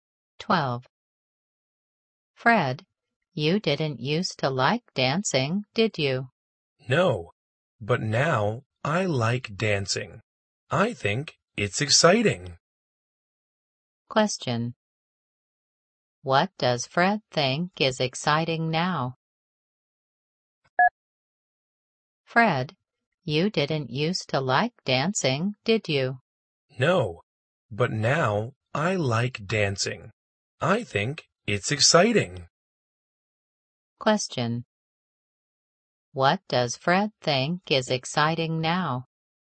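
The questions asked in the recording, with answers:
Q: What does Fred think is exciting now?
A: Dancing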